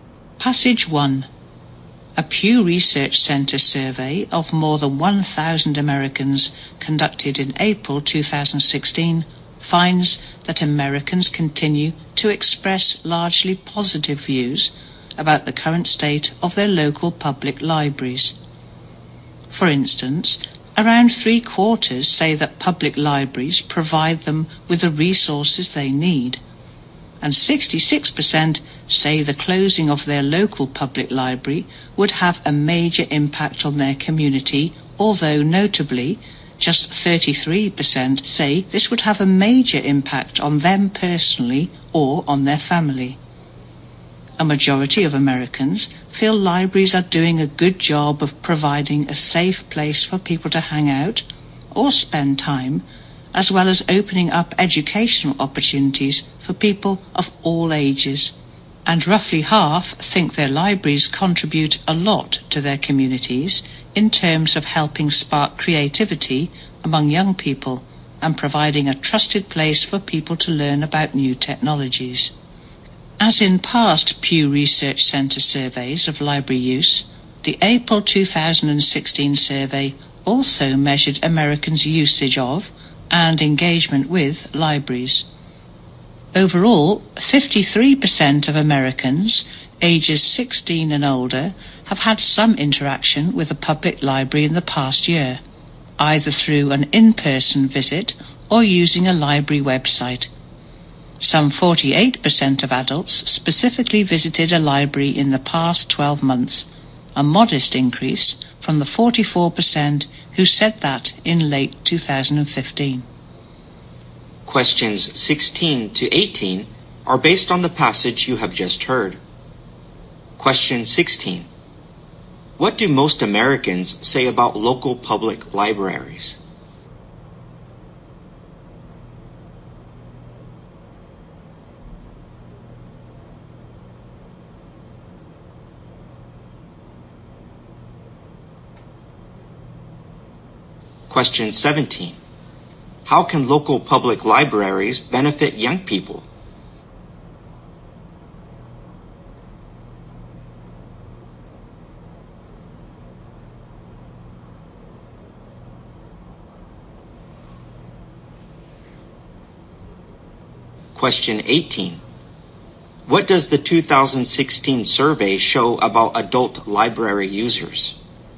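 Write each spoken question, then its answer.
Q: What do most Americans say about local public libraries?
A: They provide the resources people need

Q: How can local public libraries benefit young people?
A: By helping spark their creativity

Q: What does the 2016 survey show about adult library users?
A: Their number increased a little (48%, up from 44%)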